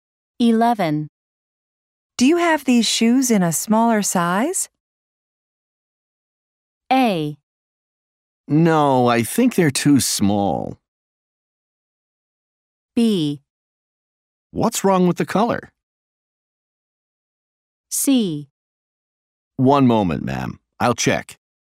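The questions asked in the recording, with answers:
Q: Do you have these shoes in a smaller size?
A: C: One moment, ma'am. I'll check.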